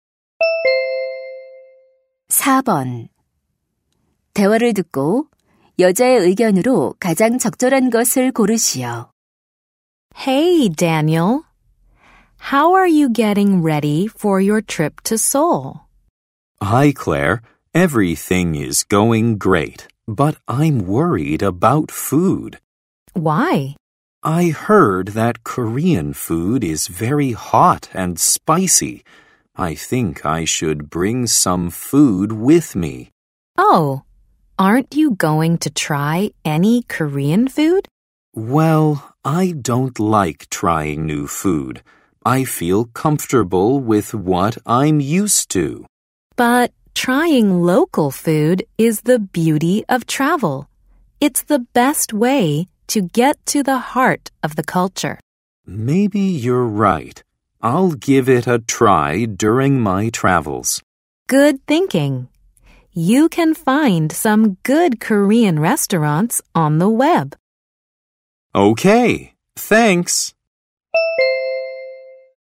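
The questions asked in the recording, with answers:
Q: 대화를 듣고 여자의 의견으로 가장 적절한 것을 고르시오.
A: 여행 중에는 현지 음식을 먹어 보는 것이 좋다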